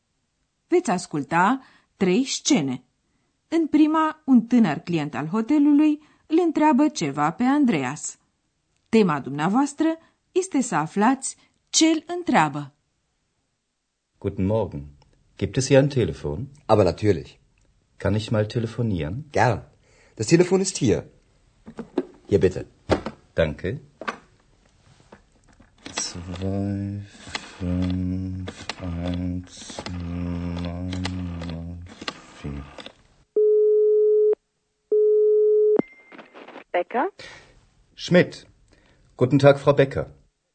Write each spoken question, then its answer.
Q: Tema dumneavoastră este să aflați ce îl întreabă.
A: Ați înțeles probabil că tânărul vrea să telefoneze.